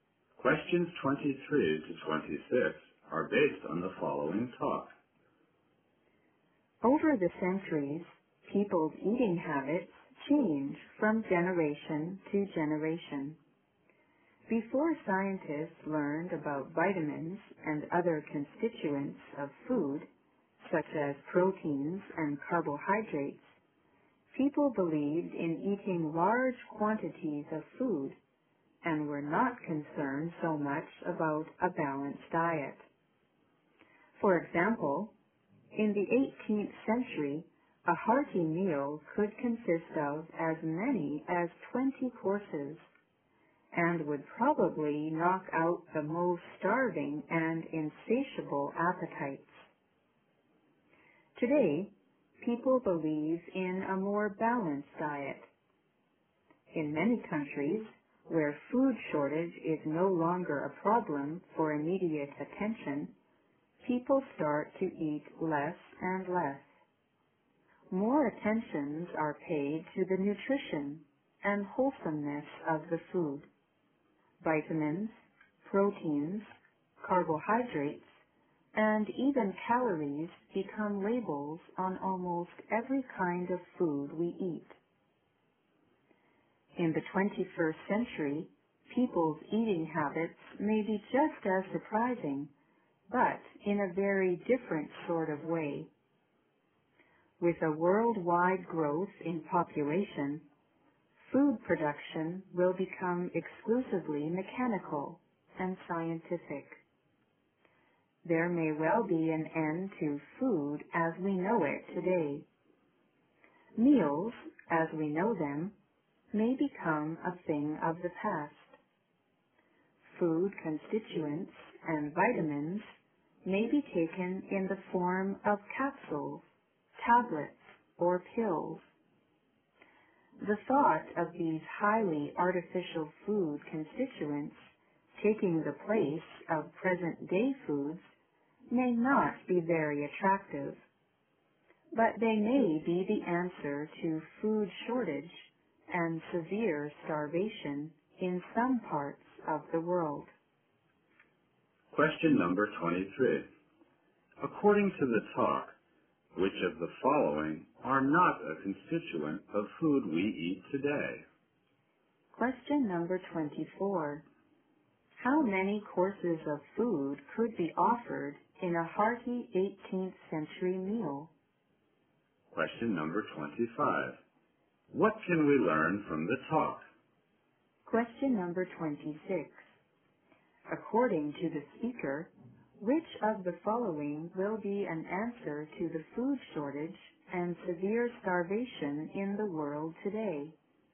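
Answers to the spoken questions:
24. As many as 20
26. Artificial food constituents in the form of capsules, tablets or pills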